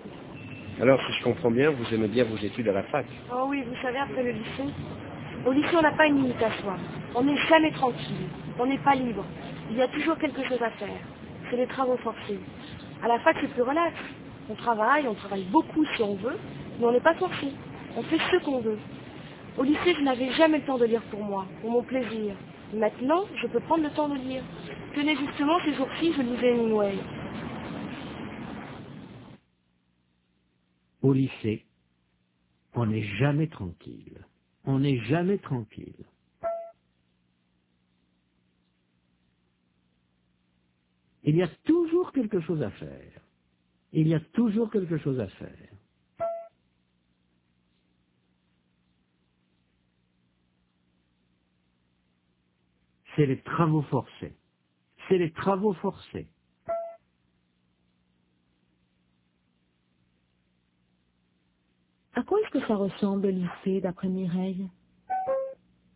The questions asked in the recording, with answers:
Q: À quoi est-ce que ça ressemble, le lycée, d'après Mireille?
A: Aux travaux forcés.